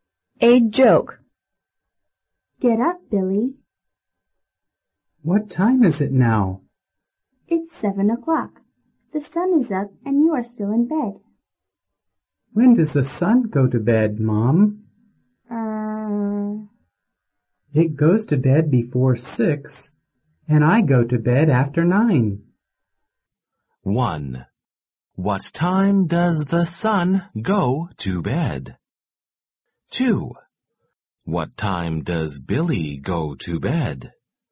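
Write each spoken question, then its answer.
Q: What time does the sun go to bed?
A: Before 6.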